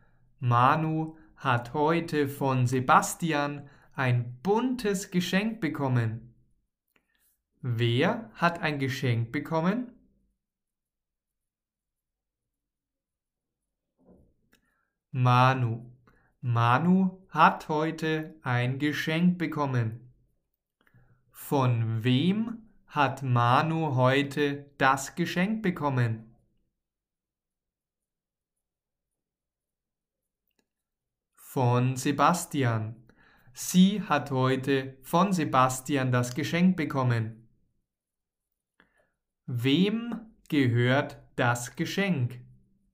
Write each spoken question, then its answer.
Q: Wer hat ein Geschenk bekommen?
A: Manu. Manu hat heute ein Geschenk bekommen.

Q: Wem gehört das Geschenk?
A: Manu. Das Geschenk gehört Manu.